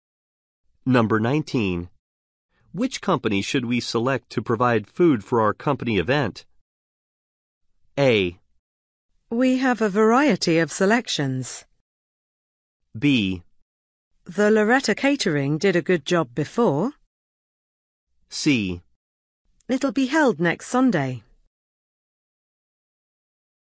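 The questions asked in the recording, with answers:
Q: Which company should we select to provide food for our company event?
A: B: The Loretta Catering did a good job before.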